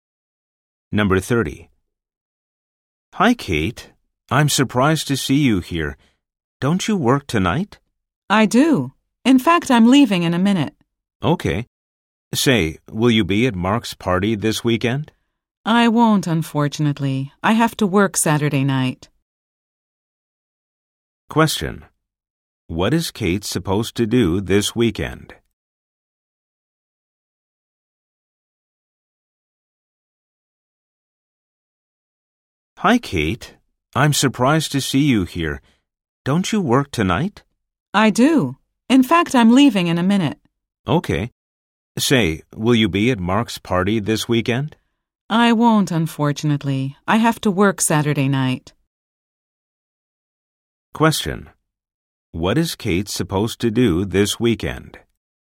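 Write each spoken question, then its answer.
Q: What is Kate supposed to do this weekend?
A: Work on Saturday night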